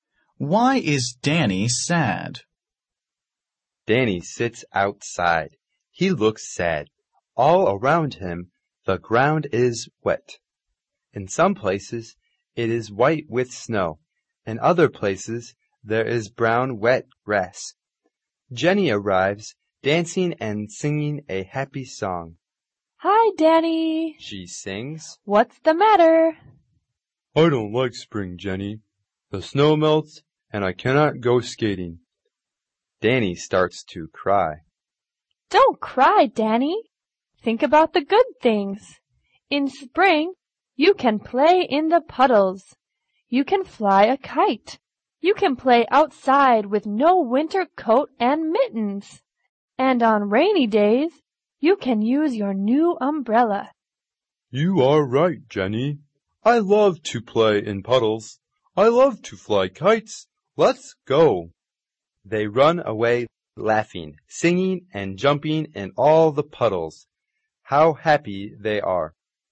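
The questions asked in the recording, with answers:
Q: Why is Danny sad?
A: Because the snow melts and he cannot go skating.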